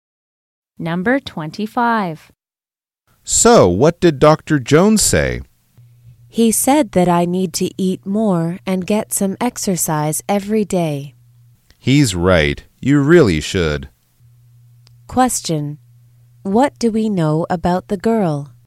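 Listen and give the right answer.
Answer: She needs to eat more and exercise every day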